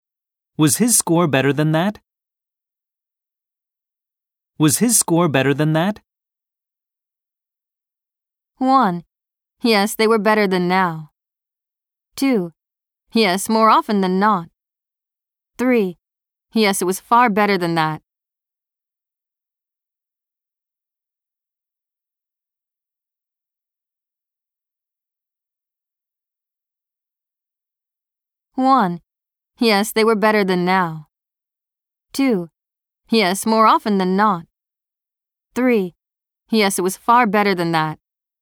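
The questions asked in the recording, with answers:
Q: Was his score better than that?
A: 3: Yes, it was far better than that.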